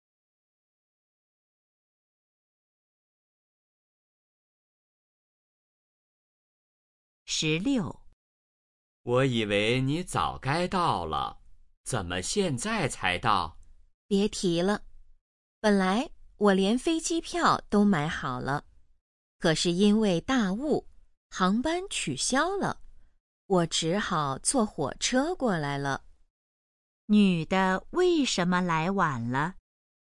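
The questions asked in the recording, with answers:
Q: 女的为什么来晚了?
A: 因为大雾航班取消,只好坐火车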